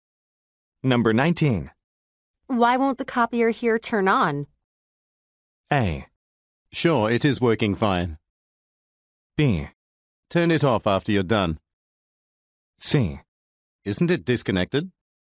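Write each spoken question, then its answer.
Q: Why won't the copier here turn on?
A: C: Isn't it disconnected?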